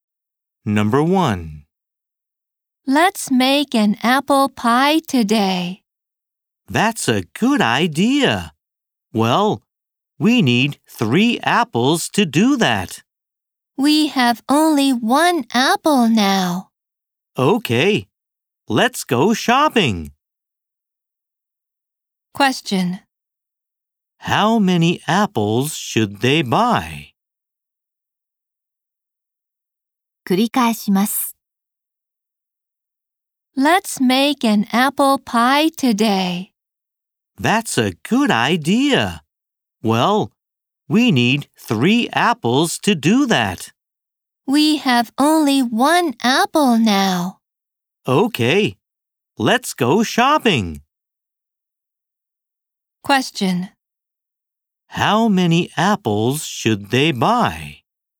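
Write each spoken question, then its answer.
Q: How many apples should they buy?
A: Two apples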